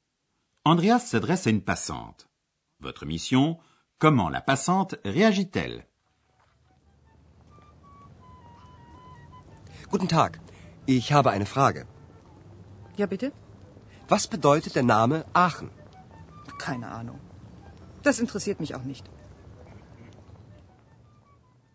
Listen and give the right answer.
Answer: La passante n'a aucune idée.